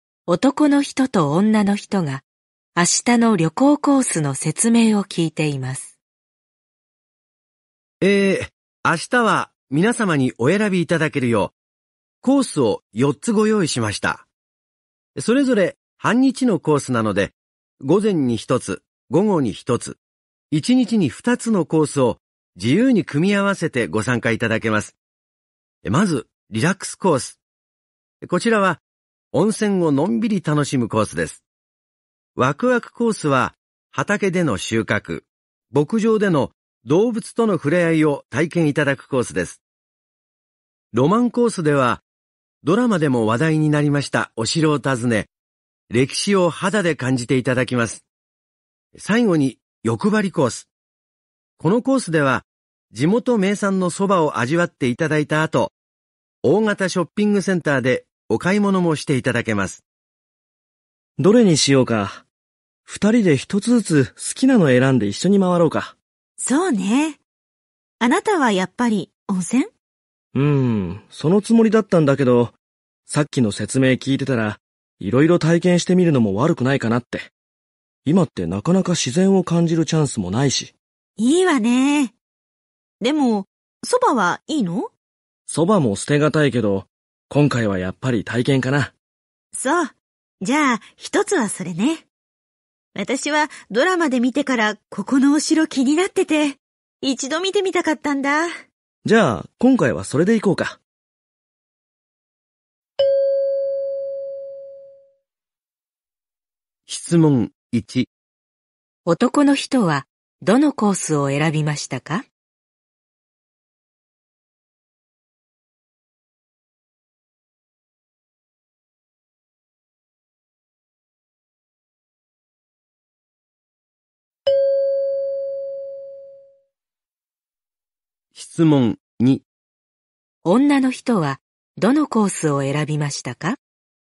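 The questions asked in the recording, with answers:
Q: 男の人は、どのコースを選びましたか?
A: ワクワクコース

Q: 女の人はどのコースを選びましたか?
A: ロマンコース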